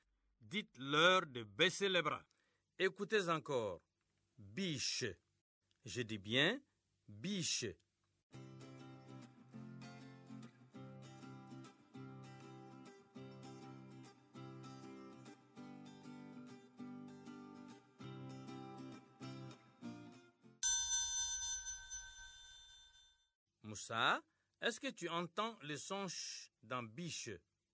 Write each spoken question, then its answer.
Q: Moussa, est-ce que tu entends le son ch dans biche?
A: Oui, monsieur. Dans biche, il y a le son ch.